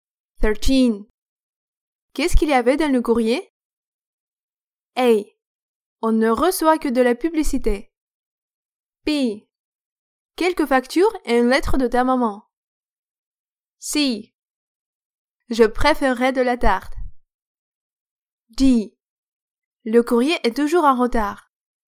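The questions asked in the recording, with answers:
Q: Qu'est-ce qu'il y avait dans le courrier?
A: B: Quelques factures et une lettre de ta maman.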